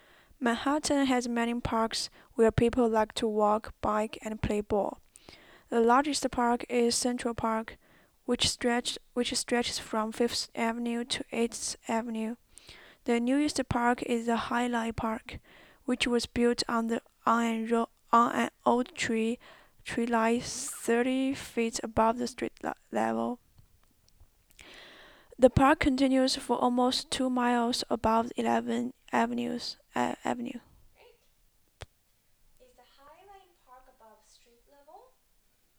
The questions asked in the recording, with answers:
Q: Is the Highland Park above street level?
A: Yes, it is.